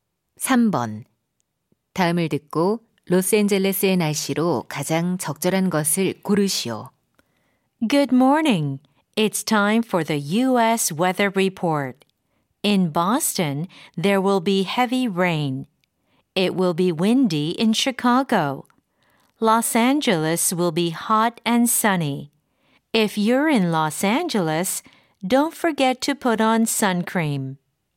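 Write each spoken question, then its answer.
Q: 다음을 듣고 로스앤젤레스의 날씨로 가장 적절한 것을 고르시오.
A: 덥고 맑음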